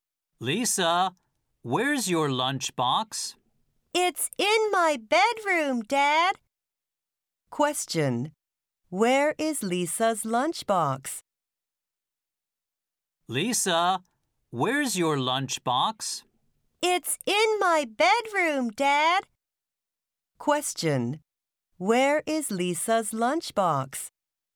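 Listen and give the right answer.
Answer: In her bedroom.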